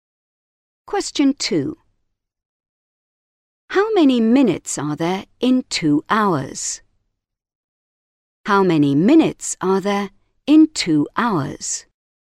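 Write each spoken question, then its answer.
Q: How many minutes are there in 2 hours?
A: 120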